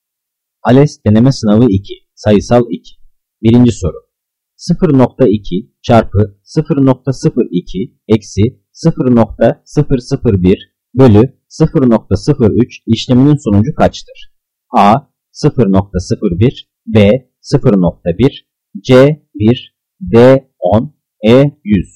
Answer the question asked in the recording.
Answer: Cevap B 0.1.